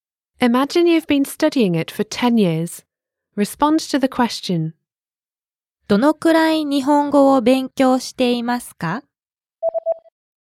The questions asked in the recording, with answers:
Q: どのくらい日本語を勉強していますか?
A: 10年間です。